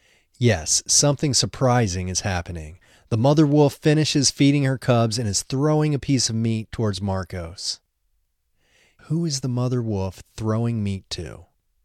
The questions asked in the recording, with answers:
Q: Who is the mother wolf throwing meat to?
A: The mother wolf is throwing meat to Marcos.